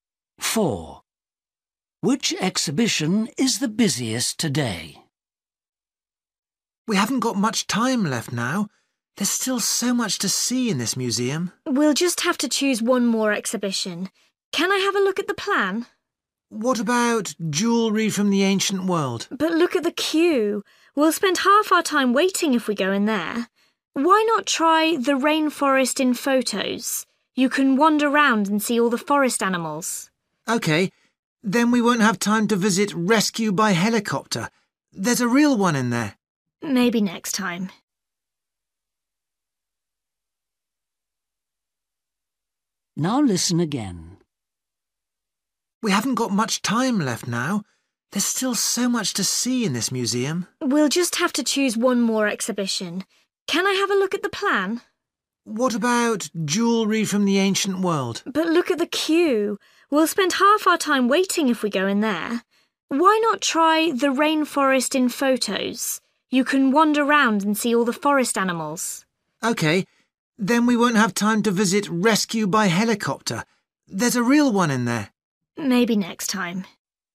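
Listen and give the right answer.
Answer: the jewellery from the ancient world exhibition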